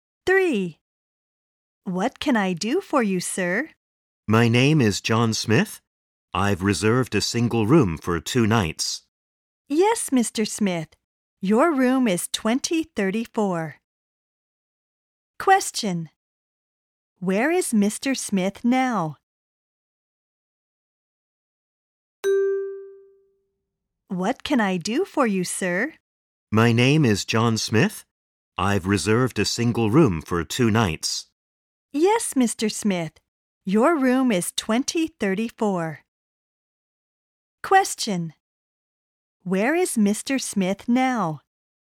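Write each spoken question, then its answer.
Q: Where is Mr. Smith now?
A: At a hotel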